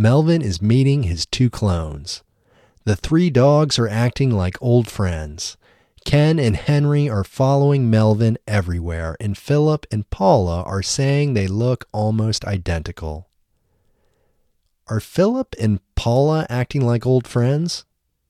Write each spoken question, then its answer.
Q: Are Philip and Paula acting like old friends?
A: No, Philip and Paula aren't acting like old friends.